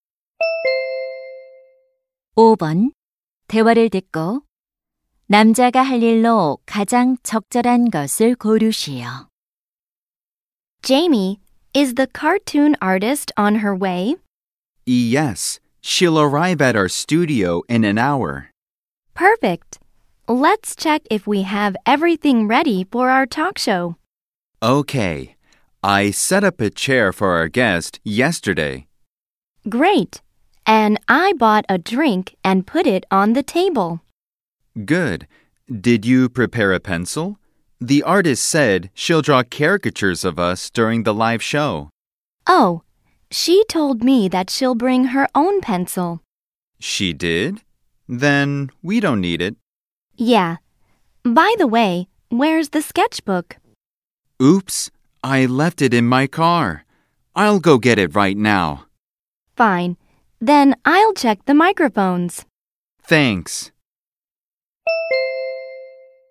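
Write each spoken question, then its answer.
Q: 대화를 듣고 남자가 할 일로 가장 적절한 것을 고르시오.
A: 차에 두고 온 스케치북 가져오기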